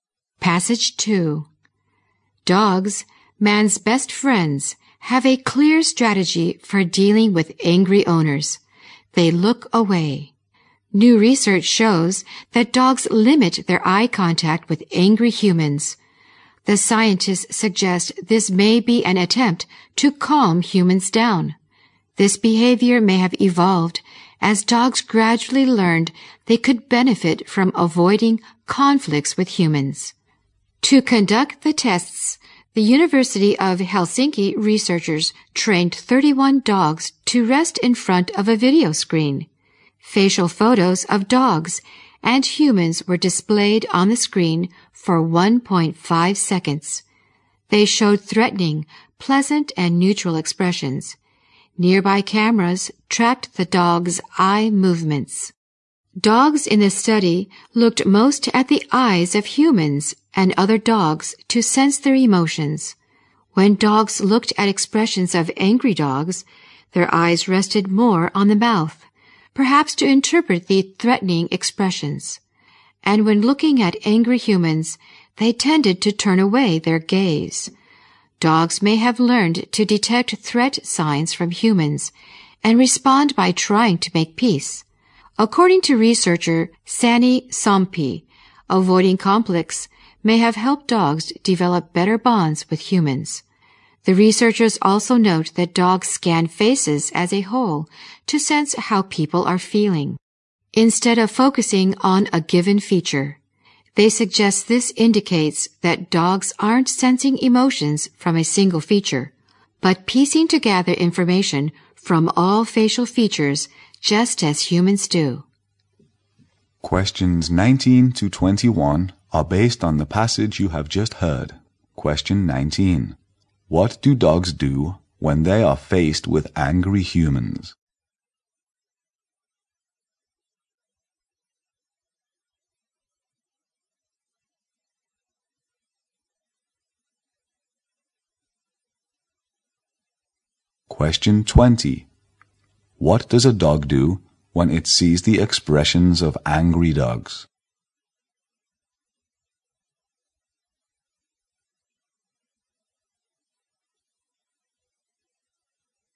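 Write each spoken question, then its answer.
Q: What do dogs do when they are faced with angry humans?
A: They look away and avoid eye contact

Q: What does a dog do when it sees the expressions of angry dogs?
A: Its eyes rest more on the mouth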